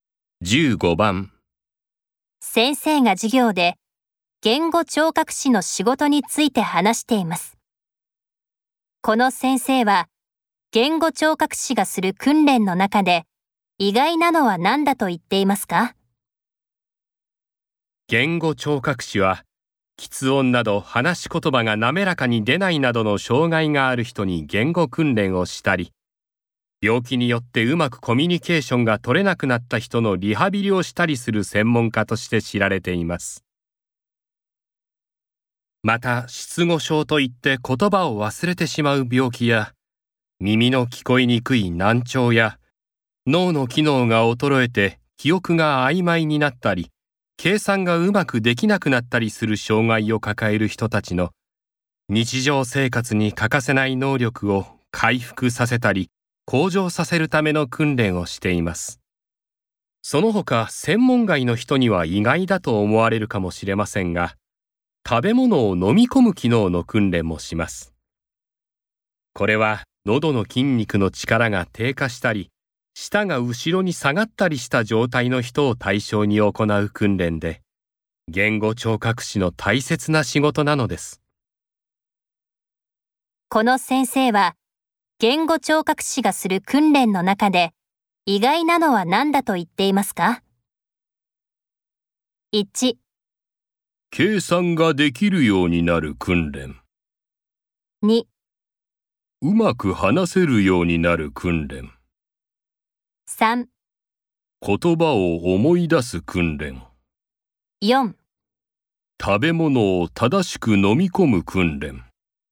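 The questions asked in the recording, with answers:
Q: この先生は言語聴覚士がする訓練の中で意外なのは何だと言っていますか?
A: 4: 食べ物を正しく飲み込む訓練。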